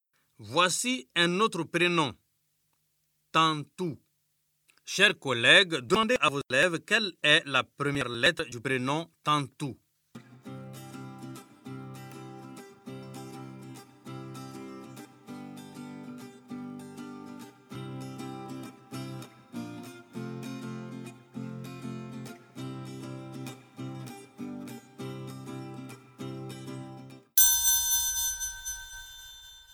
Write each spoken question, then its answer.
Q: Chers collègues, demandez à vos élèves quelle est la première lettre du prénom Tantou.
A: Monsieur, je sais. Tantou commence par la lettre T.